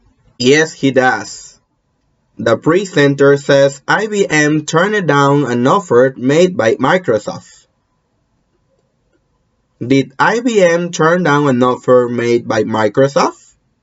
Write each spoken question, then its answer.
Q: Did IBM turn down an offer made by Microsoft?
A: Yes. IBM turned down an offer made by Microsoft.